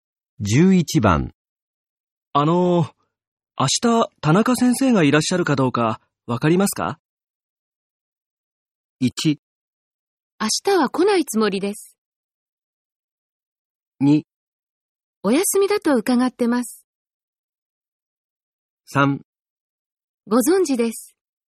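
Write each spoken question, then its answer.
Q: 明日、田中先生がいらっしゃるかどうか、わかりますか?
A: 2: お休みだと伺ってます。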